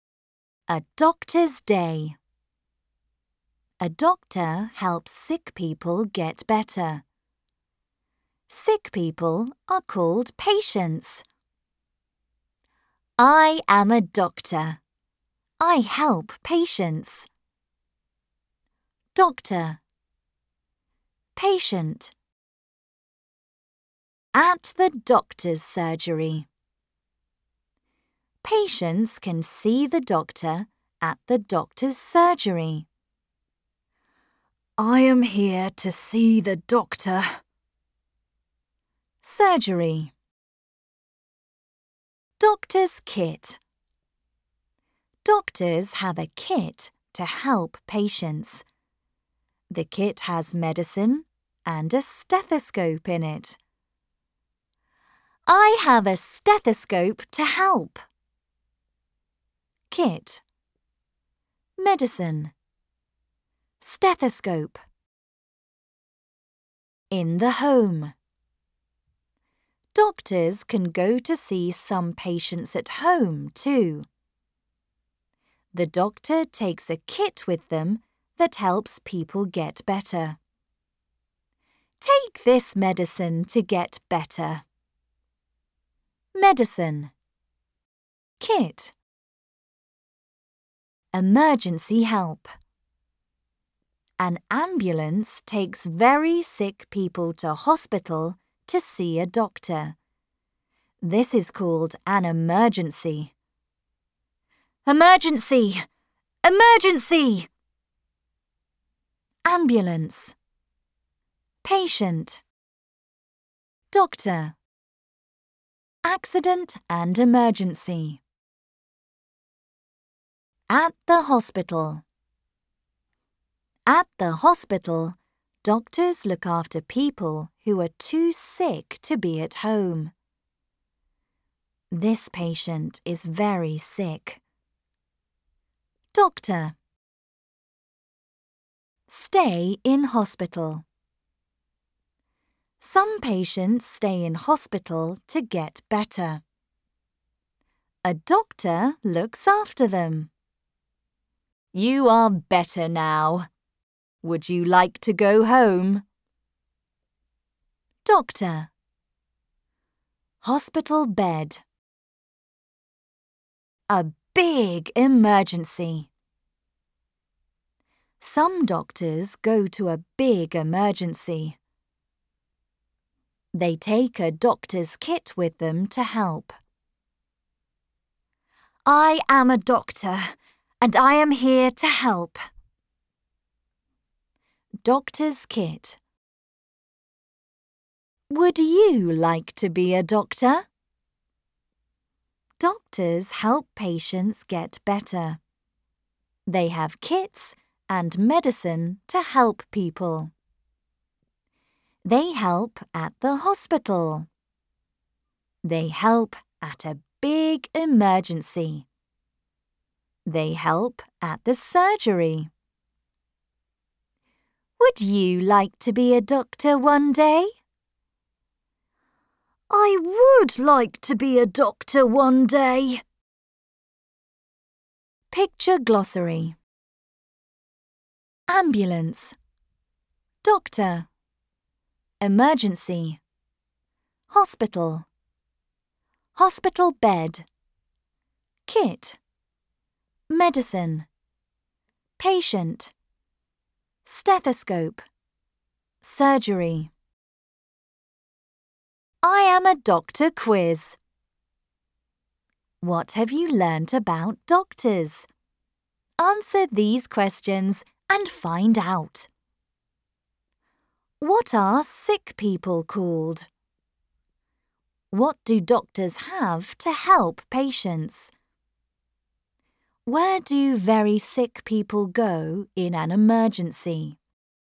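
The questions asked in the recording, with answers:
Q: What are sick people called?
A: Patients

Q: What do doctors have to help patients?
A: A kit with medicine and a stethoscope

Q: Where do very sick people go in an emergency?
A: To hospital, in an ambulance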